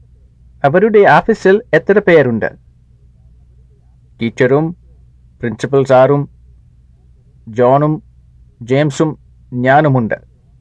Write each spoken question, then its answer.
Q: അവരുടെ ഓഫീസിൽ എത്ര പേരുണ്ട്?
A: അഞ്ച് പേരുണ്ട്.